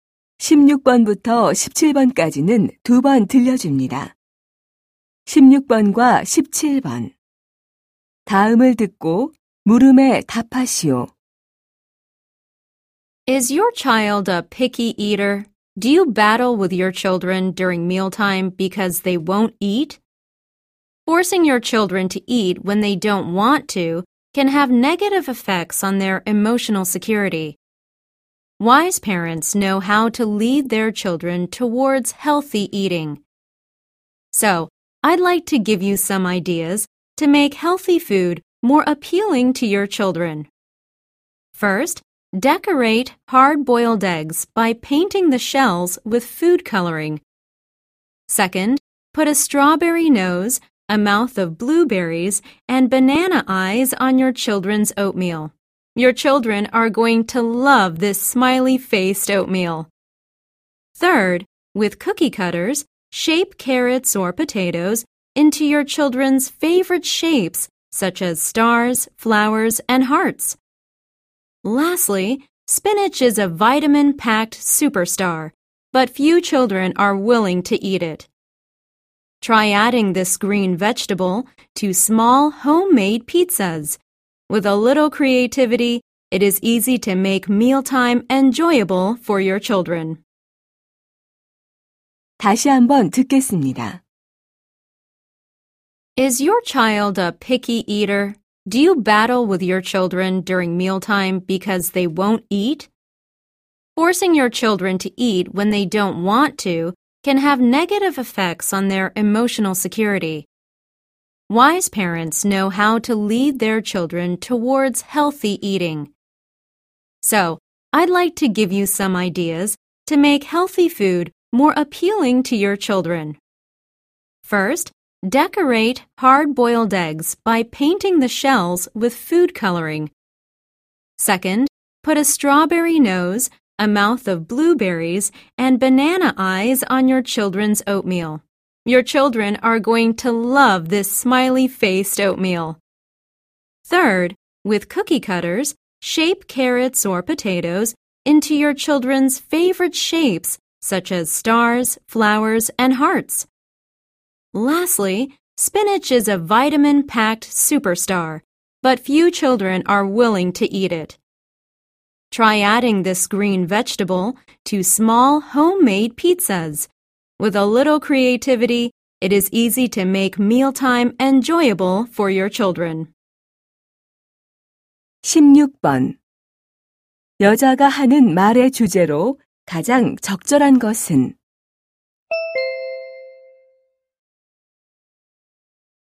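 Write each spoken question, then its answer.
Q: 여자가 하는 말의 주제로 가장 적절한 것은?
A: 아이들에게 건강한 음식을 더 먹음직스럽게 만드는 방법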